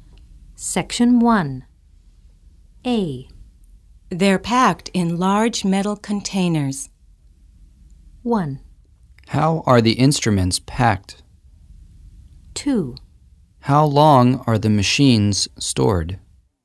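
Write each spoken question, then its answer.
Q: They're packed in large metal containers.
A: 1: How are the instruments packed?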